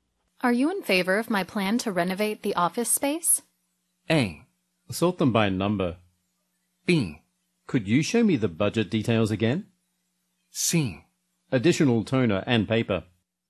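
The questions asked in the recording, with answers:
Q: Are you in favor of my plan to renovate the office space?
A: B: Could you show me the budget details again?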